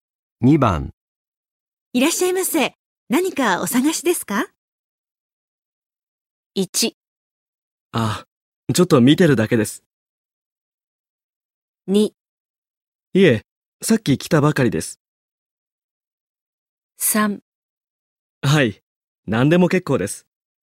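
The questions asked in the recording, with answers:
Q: いらっしゃいませ。何かお探しですか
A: 1: あ、ちょっと見てるだけです。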